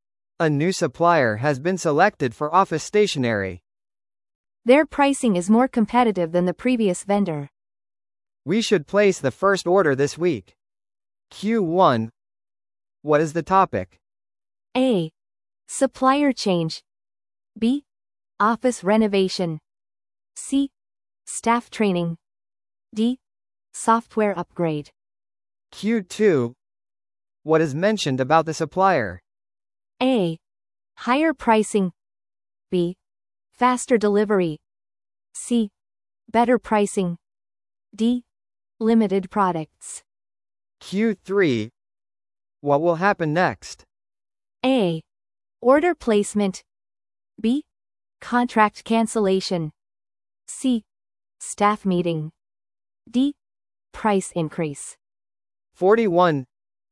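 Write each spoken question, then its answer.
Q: What is the topic?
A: A: Supplier change.

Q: What is mentioned about the supplier?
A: C: Better pricing.

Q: What will happen next?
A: A: Order placement.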